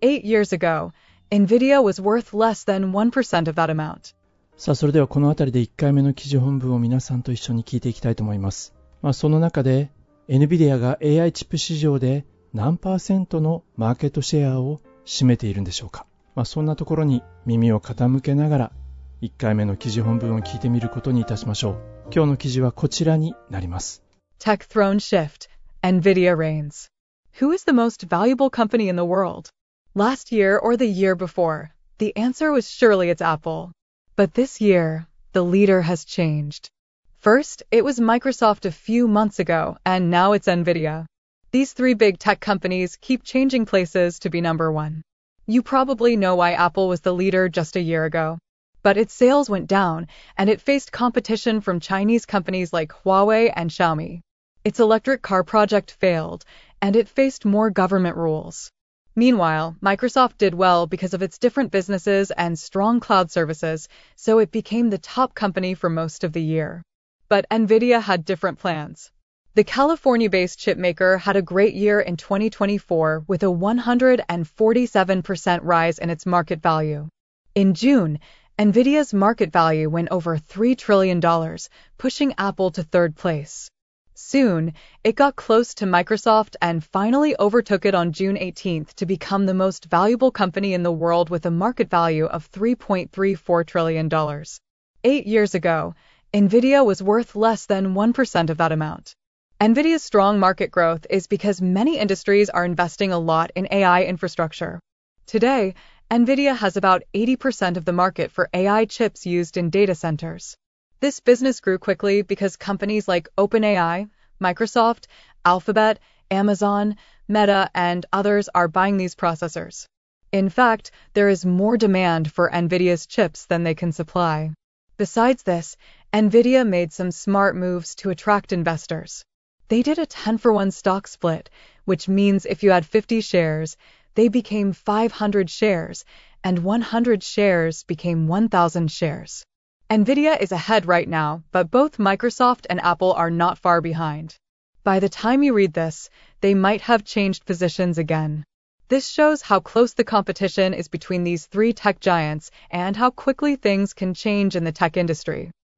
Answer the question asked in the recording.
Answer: AI チップの市場で80% NVIDIA はマーケットシェアを獲得しているんですね。